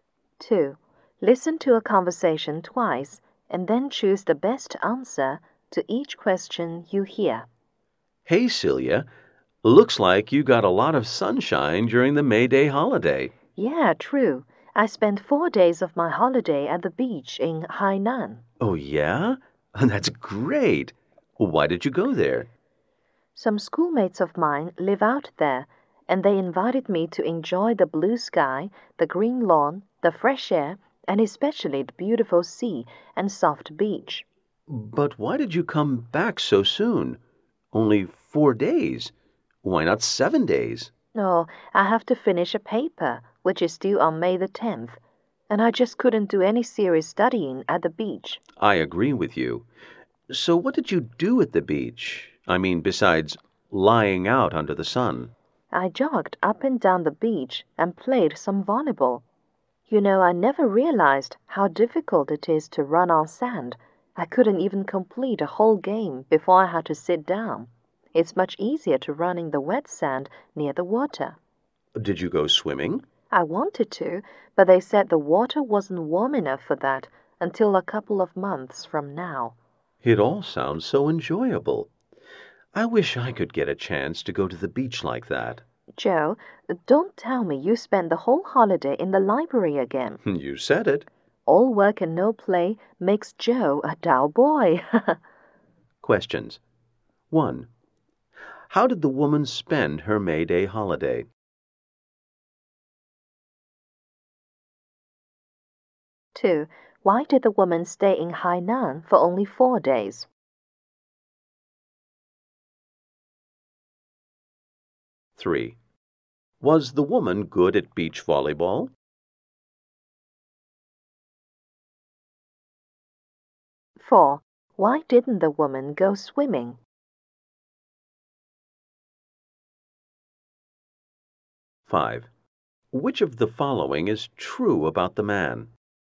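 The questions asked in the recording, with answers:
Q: How did the woman spend her May Day holiday?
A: She spent 4 days at the beach in Hainan with some schoolmates.

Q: Why did the woman stay in Hainan for only 4 days?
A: She had to finish a paper due on May 10th.

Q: Was the woman good at beach volleyball?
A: No, she couldn't even finish a whole game.

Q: Why didn't the woman go swimming?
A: The water wasn't warm enough yet.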